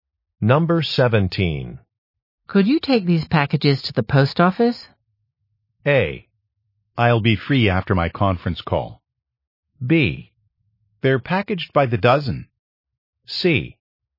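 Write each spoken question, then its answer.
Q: Could you take these packages to the post office?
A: A: I'll be free after my conference call.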